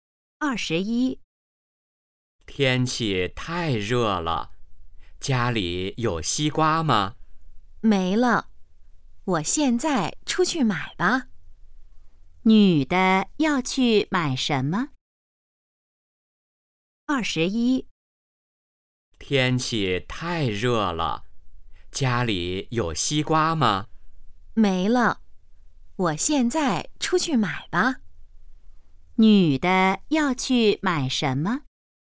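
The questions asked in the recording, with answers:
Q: 女的要去买什么?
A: 西瓜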